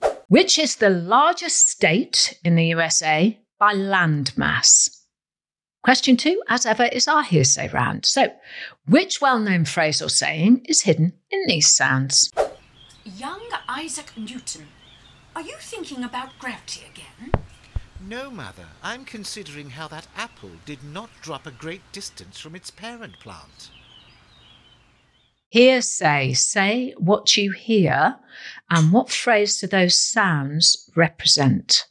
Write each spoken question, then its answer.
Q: Hearsay, say what you hear, and what phrase do those sounds represent?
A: the apple never falls far from the tree.